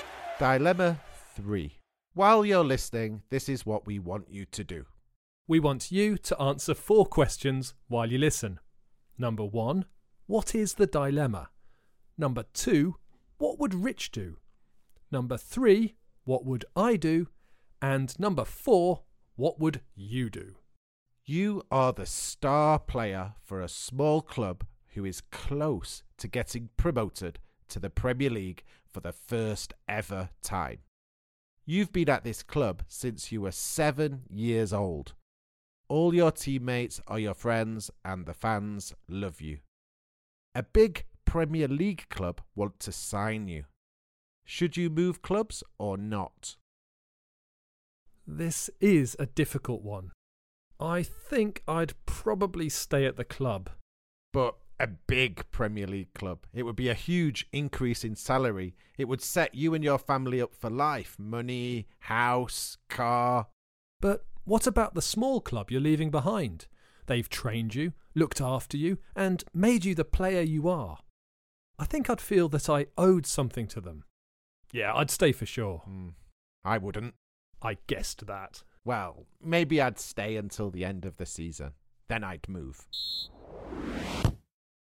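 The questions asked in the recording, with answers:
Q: what is the dilemma?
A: Whether to stay at his small club or move to a big Premier League club

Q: what would Rich do?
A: Move, maybe after staying until the end of the season

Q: what would I do?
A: Stay at the club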